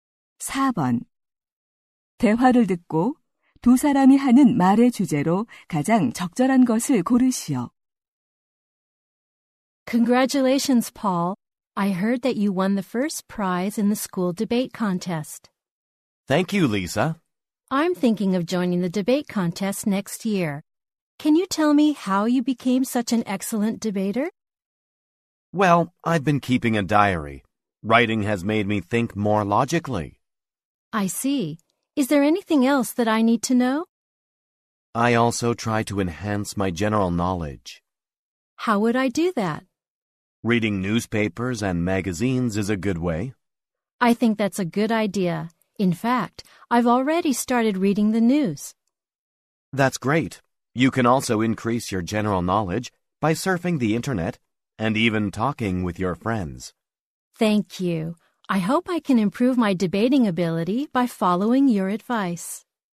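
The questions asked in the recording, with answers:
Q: 대화를 듣고 두 사람이 하는 말의 주제로 가장 적절한 것을 고르시오.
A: 토론을 잘하는 방법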